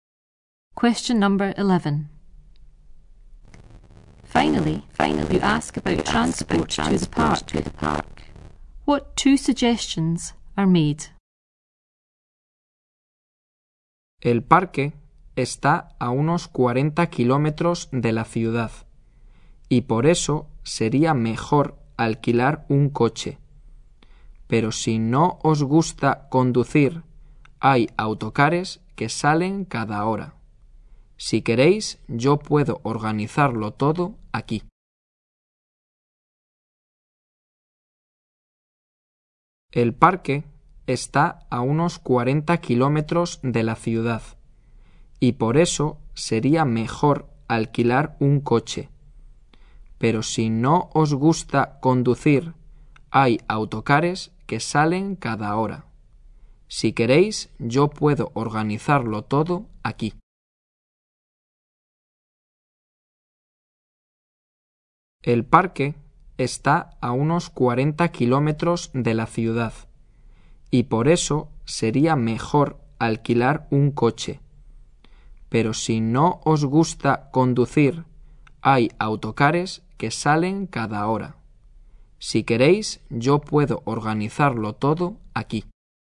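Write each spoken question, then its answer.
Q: What two suggestions are made?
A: Hire a car, or take the coaches that leave every hour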